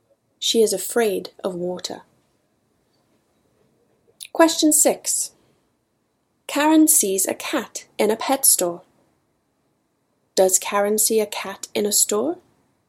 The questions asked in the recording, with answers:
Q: Does Karen see a cat in a store?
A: Yes, Karen sees a cat in a pet store.